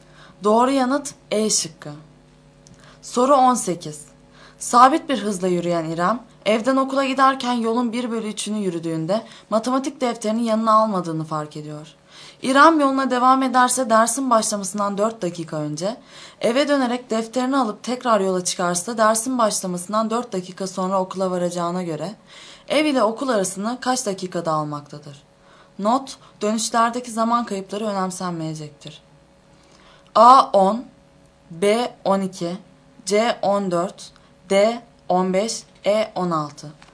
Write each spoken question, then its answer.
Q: İrem yoluna devam ederse dersin başlamasından 4 dakika önce, eve dönerek defterini alıp tekrar yola çıkarsa dersin başlamasından 4 dakika sonra okula varacağına göre, ev ile okul arasını kaç dakikada almaktadır?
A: Doğru yanıt B şıkkı.